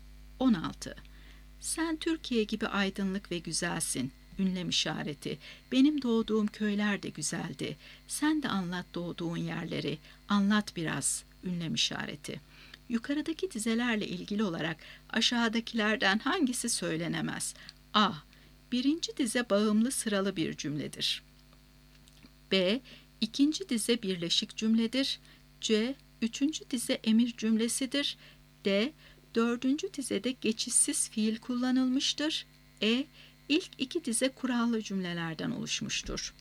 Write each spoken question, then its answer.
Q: Yukarıdaki dizelerle ilgili olarak aşağıdakilerden hangisi söylenemez?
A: Doğru cevap D şıkkı. Dördüncü dizede geçişsiz fiil kullanılmıştır.